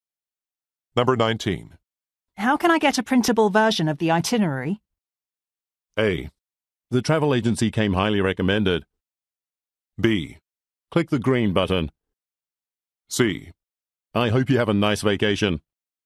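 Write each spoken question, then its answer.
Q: How can I get a printable version of the itinerary?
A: B: Click the green button.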